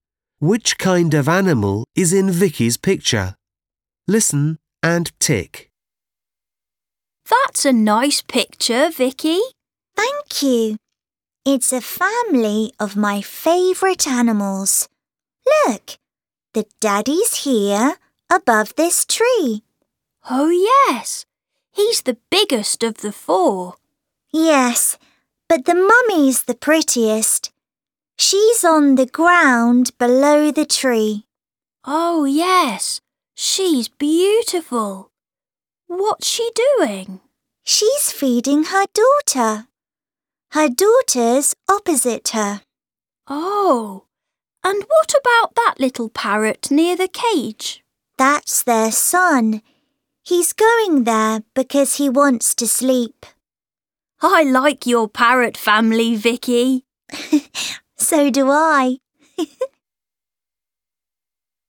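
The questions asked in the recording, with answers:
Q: Which kind of animal is in Vicky's picture?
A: parrots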